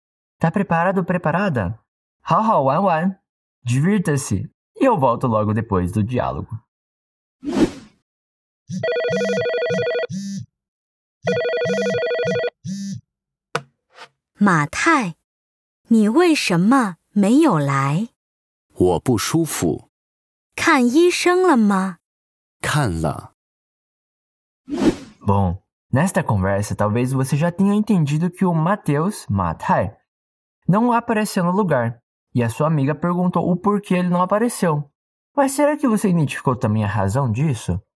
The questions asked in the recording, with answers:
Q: Mas será que você identificou também a razão disso?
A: Mateus disse que passou mal.